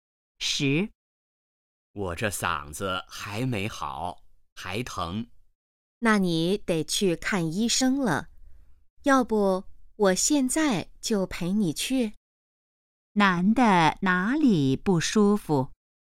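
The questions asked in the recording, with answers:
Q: 男的哪里不舒服?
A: 嗓子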